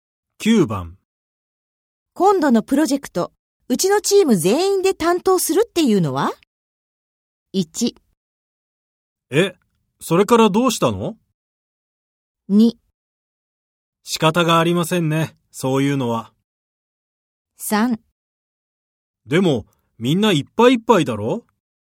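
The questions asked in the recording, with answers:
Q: 今度のプロジェクト、うちのチーム全員で担当するっていうのは?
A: 3: でも、みんないっぱいいっぱいだろ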